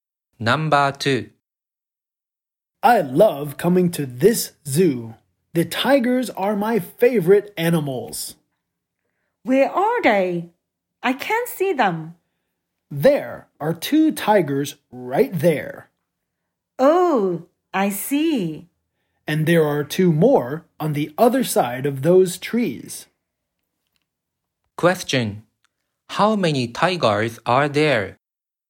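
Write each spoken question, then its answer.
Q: Question: How many tigers are there?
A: Four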